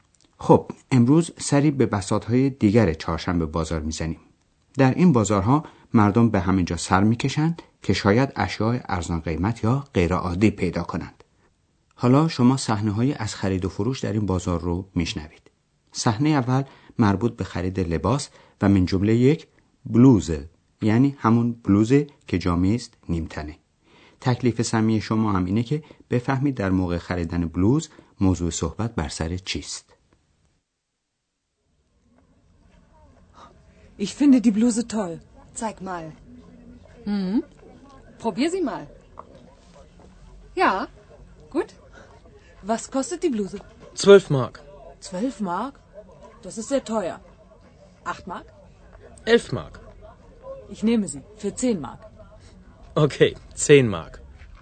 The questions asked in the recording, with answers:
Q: تکلیف سمی شما هم اینه که بفهمید در موقع خریدن بلوز موضوع صحبت بر سر چیست.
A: یکی از ویژگی های چهارشنبه بازار چانه زدنه که در موقع خرید معمولی در فروشگاه ها و مغازه ها مرسوم نیست.